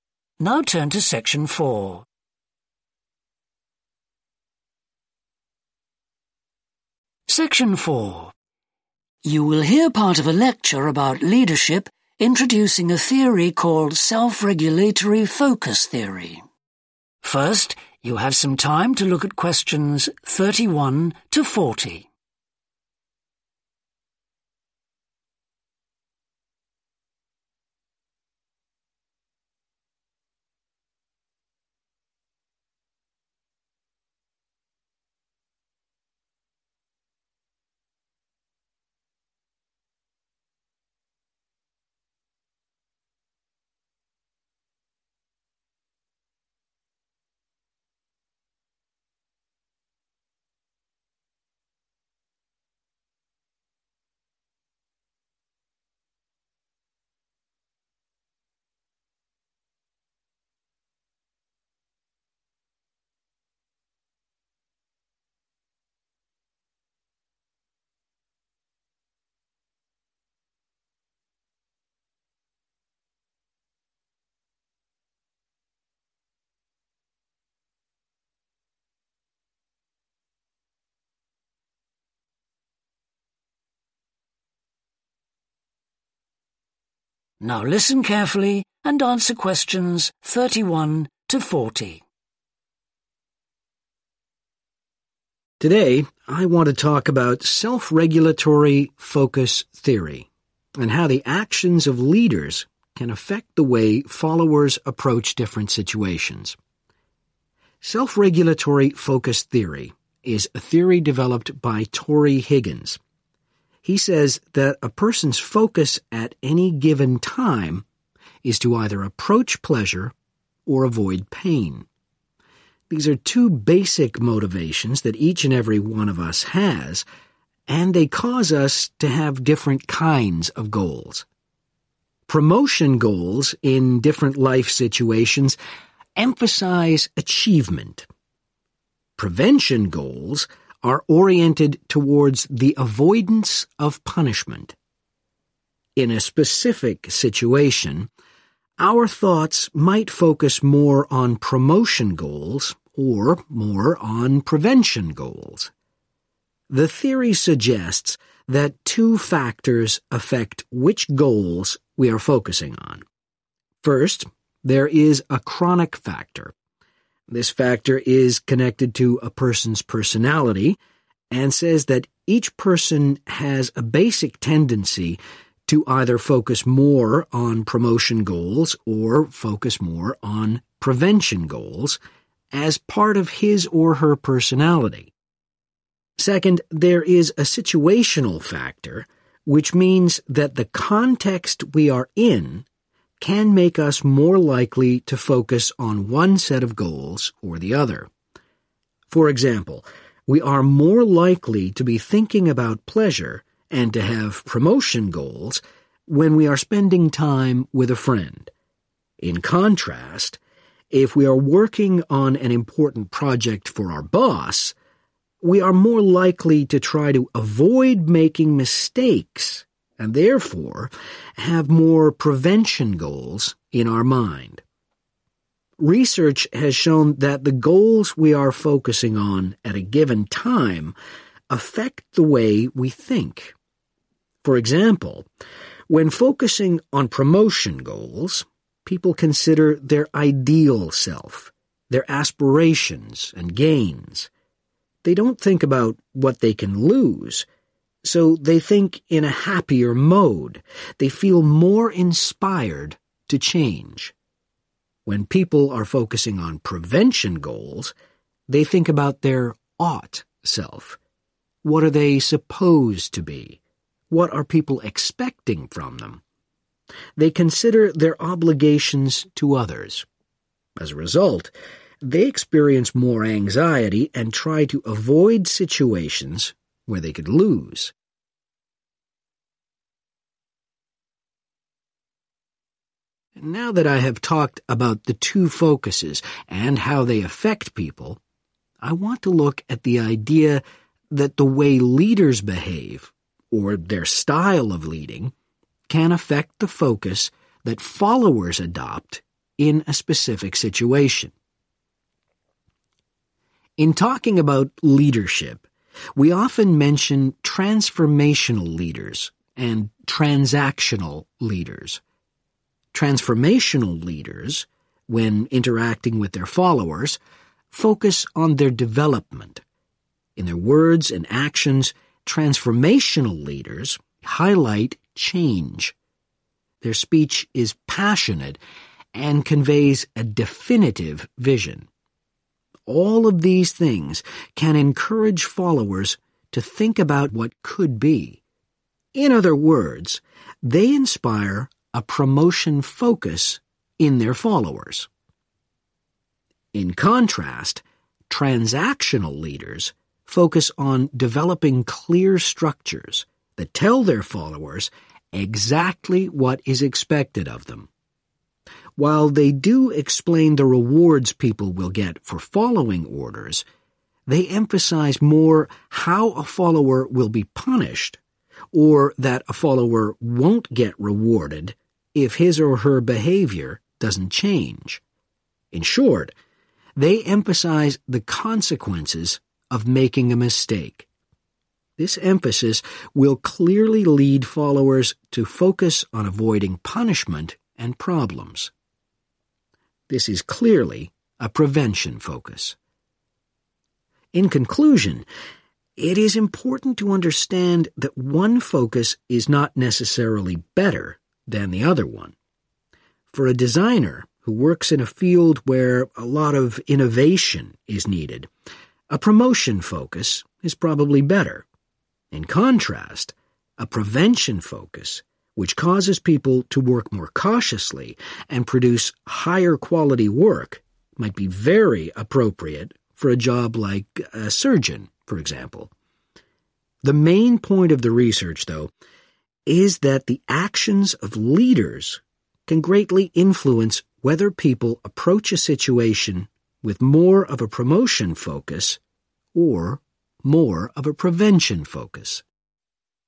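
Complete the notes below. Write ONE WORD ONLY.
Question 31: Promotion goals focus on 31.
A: achievement

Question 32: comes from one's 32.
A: personality

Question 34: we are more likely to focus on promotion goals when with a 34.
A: friend

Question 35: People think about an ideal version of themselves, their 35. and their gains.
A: aspirations

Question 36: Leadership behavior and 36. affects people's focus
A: style

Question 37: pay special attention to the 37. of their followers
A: development

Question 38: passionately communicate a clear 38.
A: vision

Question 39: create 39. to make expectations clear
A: structures

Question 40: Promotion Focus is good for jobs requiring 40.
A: innovation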